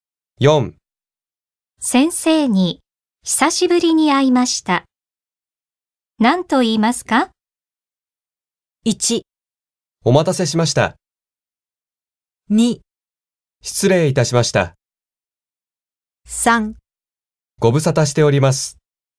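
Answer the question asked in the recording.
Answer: 3: ご無沙汰しております。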